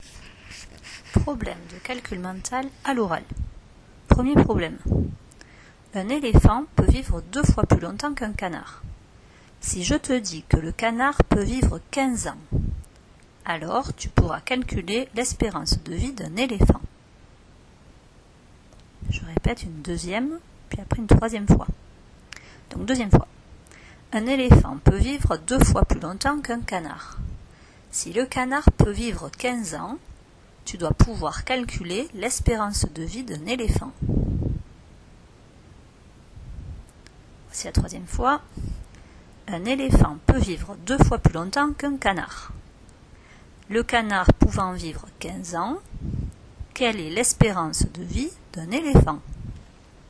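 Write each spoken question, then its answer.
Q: Le canard pouvant vivre 15 ans, quelle est l'espérance de vie d'un éléphant ?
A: 30 ans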